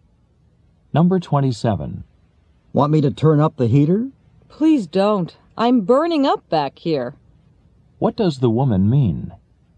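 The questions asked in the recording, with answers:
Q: What does the woman mean?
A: She is too hot already.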